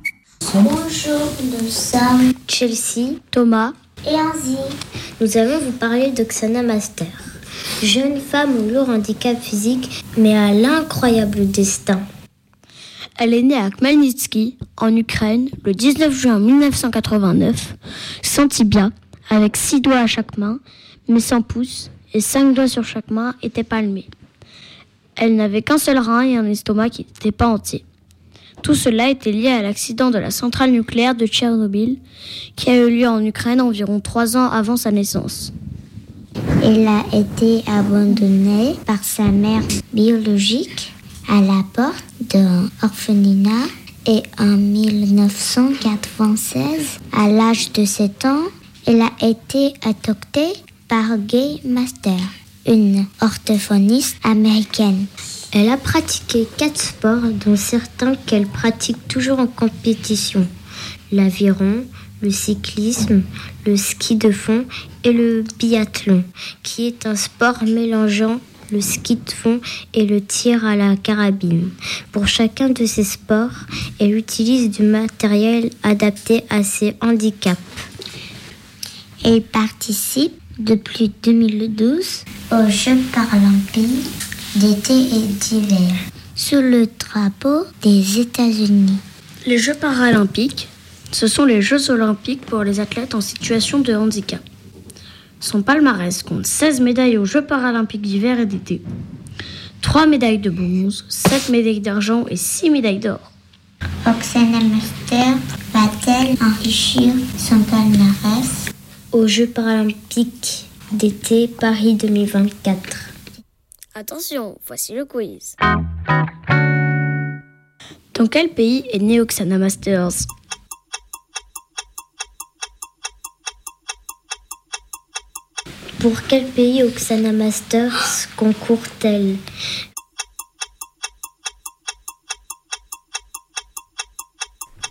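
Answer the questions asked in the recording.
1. En Ukraine
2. Les États-Unis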